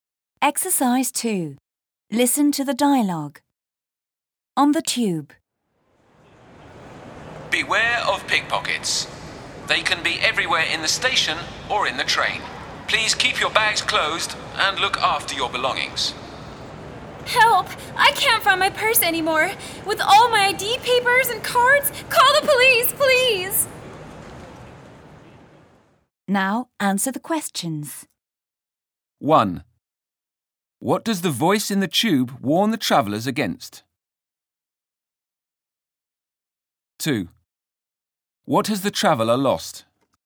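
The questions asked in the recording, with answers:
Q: What does the voice in the tube warn the travellers against?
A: Pickpockets

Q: What has the traveller lost?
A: Her purse, with all her ID papers and cards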